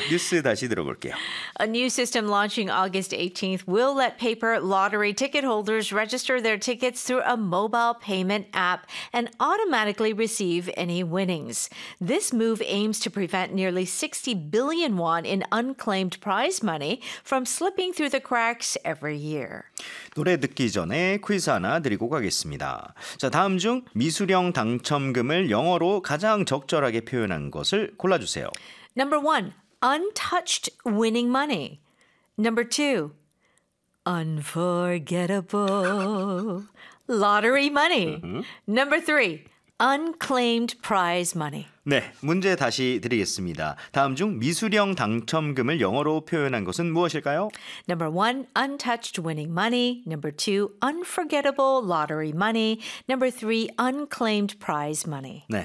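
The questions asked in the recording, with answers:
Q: 다음 중 미수령 당첨금을 영어로 표현한 것은 무엇일까요?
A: 3: unclaimed prize money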